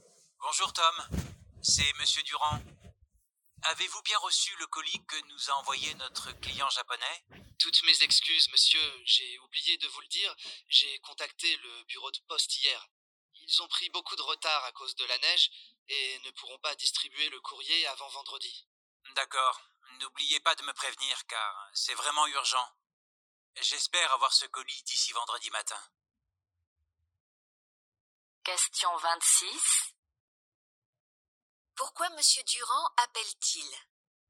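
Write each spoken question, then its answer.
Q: Pourquoi Monsieur Durand appelle-t-il ?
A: Pour savoir si Tom a bien reçu le colis envoyé par le client japonais.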